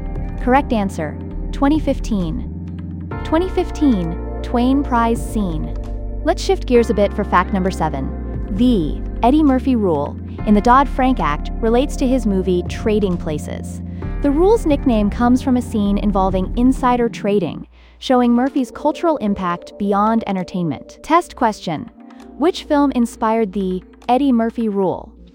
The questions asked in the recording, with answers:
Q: which film inspired the Eddie Murphy Rule?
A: Trading Places.